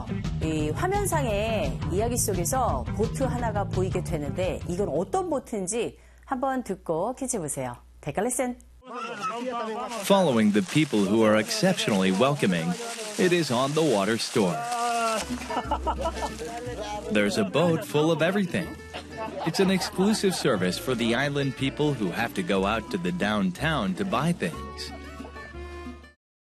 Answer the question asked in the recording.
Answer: 바로 이 배는요, 상점, 그 배 위에 매점처럼 되어 있는 그런 배입니다.